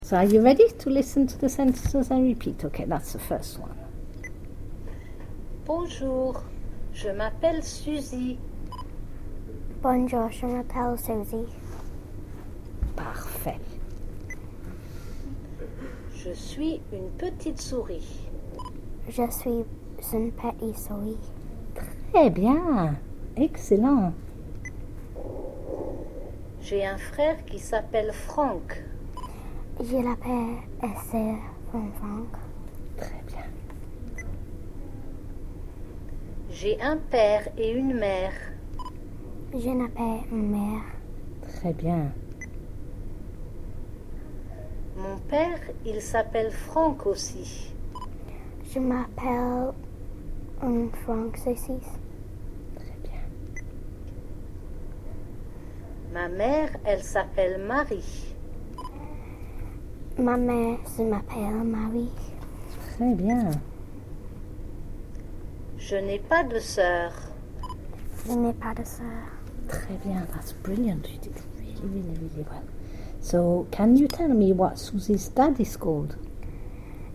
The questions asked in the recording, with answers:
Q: So, can you tell me what Susie's dad is called?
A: He was called Franck.